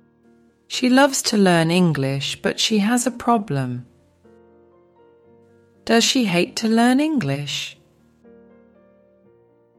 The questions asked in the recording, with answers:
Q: Does she hate to learn English?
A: No, she doesn't. She doesn't hate to learn it.